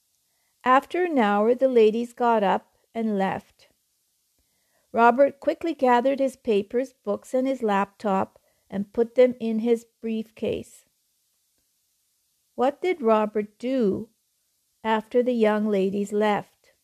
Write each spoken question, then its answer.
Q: What did Robert do after the young ladies left?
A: He quickly put his papers, books, and laptop in his briefcase.